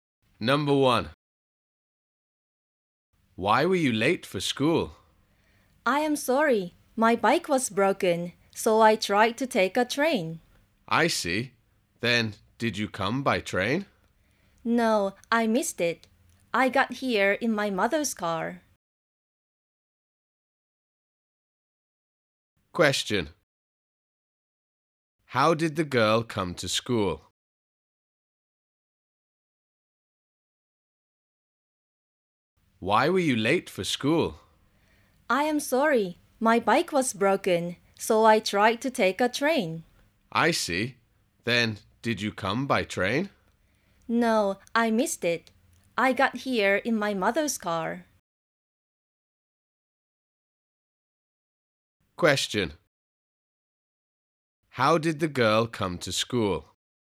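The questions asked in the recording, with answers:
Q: How did the girl come to school?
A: By her mother's car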